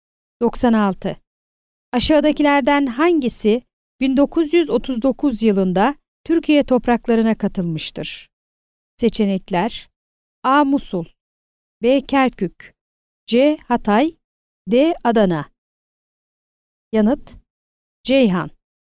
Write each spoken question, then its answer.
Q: Aşağıdakilerden hangisi 1939 yılında Türkiye topraklarına katılmıştır?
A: Yanıt: Ceyhan.